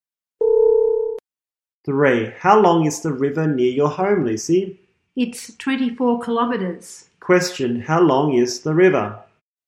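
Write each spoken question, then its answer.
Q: how long is the river?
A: 24 kilometres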